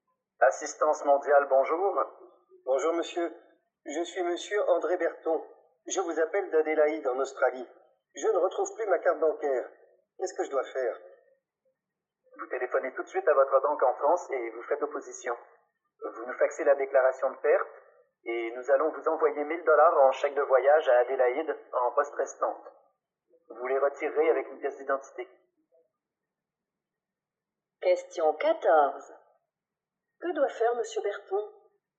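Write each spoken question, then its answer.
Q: Que doit faire monsieur Berton ?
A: Téléphoner tout de suite à sa banque en France pour faire opposition, puis faxer la déclaration de perte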